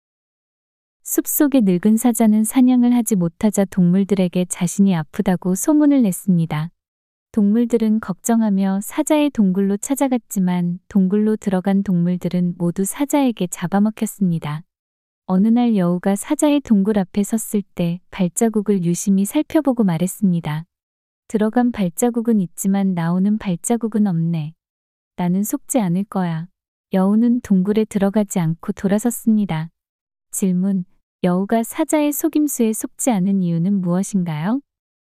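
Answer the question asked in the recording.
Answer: 동굴로 들어간 발자국만 있고 나오는 발자국이 없었기 때문에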